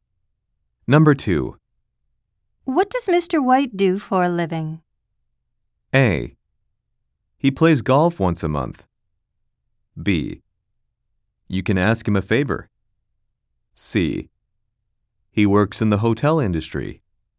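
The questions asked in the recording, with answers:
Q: What does Mr. White do for a living?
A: C: He works in the hotel industry.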